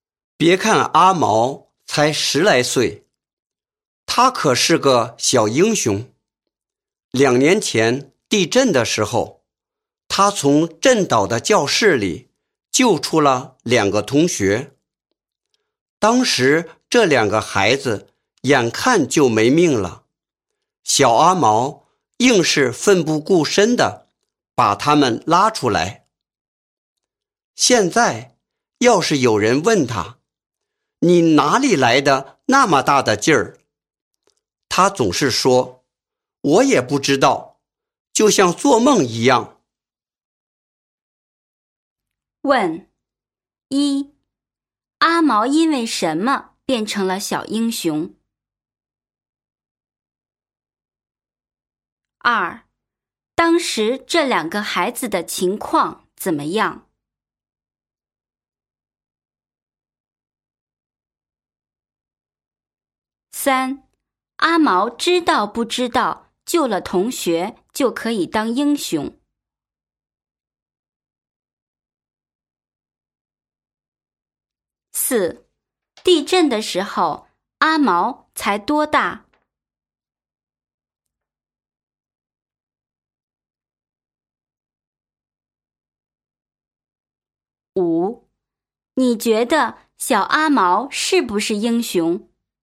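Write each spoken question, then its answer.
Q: 阿毛因为什么变成了小英雄?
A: 地震时他从震倒的教室里救出了2个同学

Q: 当时这2个孩子的情况怎么样?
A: 眼看就没命了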